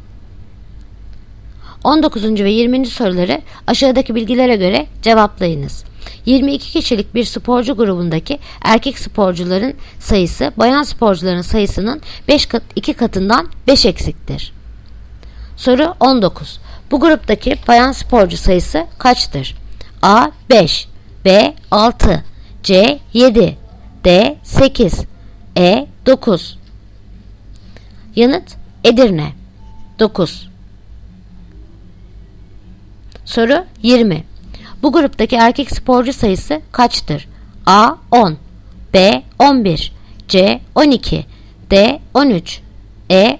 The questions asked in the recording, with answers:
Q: Bu gruptaki bayan sporcu sayısı kaçtır?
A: Yanıt Edirne 9